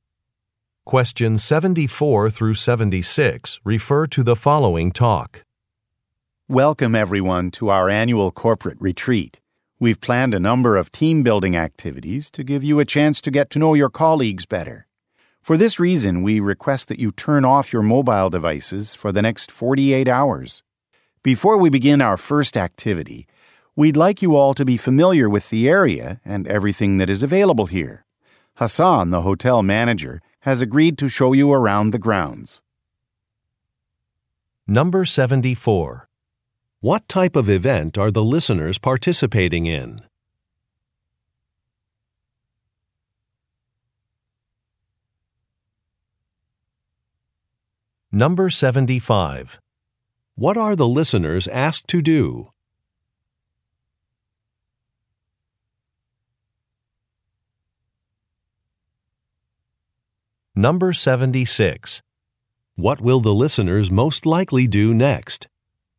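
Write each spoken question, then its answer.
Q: What type of event are the listeners participating in?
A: A corporate retreat

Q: What are the listeners asked to do?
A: Turn off their mobile devices

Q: What will the listeners most likely do next?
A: Take a tour of the grounds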